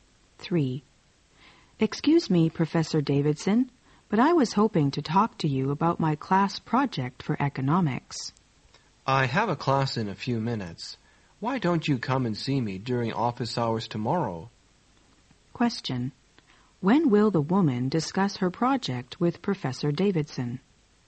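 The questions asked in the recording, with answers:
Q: When will the woman discuss her project with Professor Davidson?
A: Tomorrow, during his office hours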